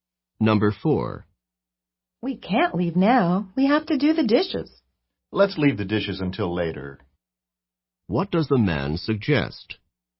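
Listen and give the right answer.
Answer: Doing the dishes later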